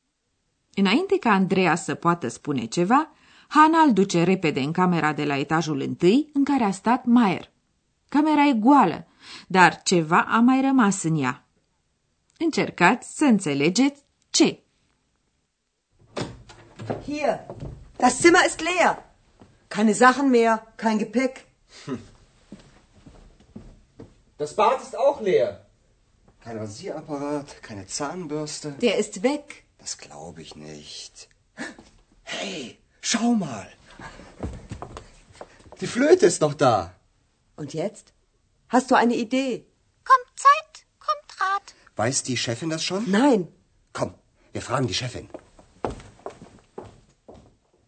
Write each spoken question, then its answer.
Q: Camera e goală, dar ceva a mai rămas în ea.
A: Singurul lucru rămas în camera goală este flautul domnului Maier.